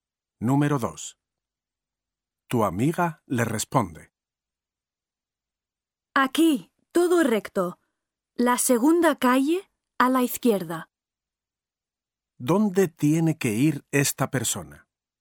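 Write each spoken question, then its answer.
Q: ¿Dónde tiene que ir esta persona?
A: todo recto, la segunda calle a la izquierda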